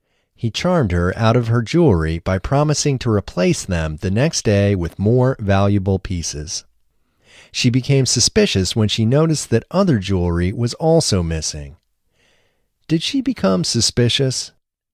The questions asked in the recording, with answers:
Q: Did she become suspicious?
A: Yes, she became suspicious.